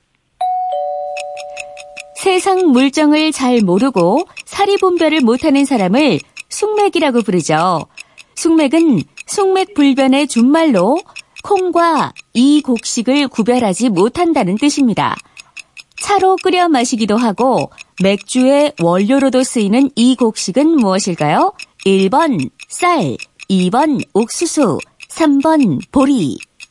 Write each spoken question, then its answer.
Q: 차로 끓여 마시기도 하고 맥주의 원료로도 쓰이는 이 곡식은 무엇일까요?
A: 3번 보리. 네.